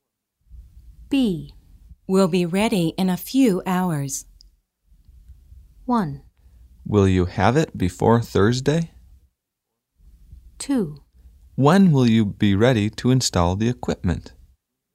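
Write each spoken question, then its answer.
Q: We'll be ready in a few hours.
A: 2: When will you be ready to install the equipment?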